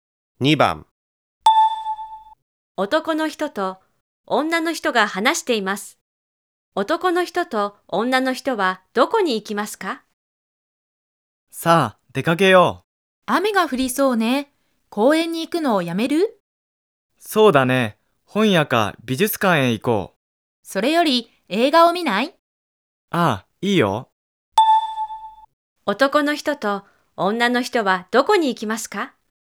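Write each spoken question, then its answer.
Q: 男の人と女の人はどこに行きますか?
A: 映画館(映画を見に行く)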